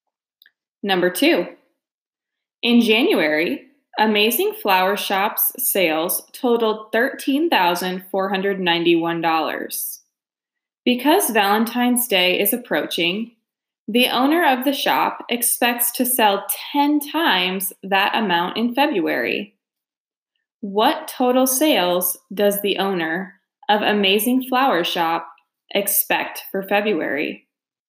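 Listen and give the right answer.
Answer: $134,910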